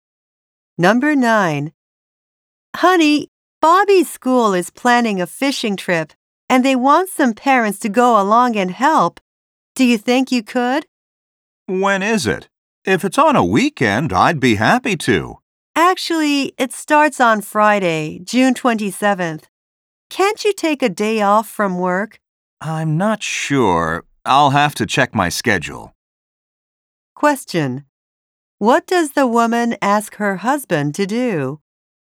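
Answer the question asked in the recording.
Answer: Help on Bobby's school fishing trip, taking a day off work.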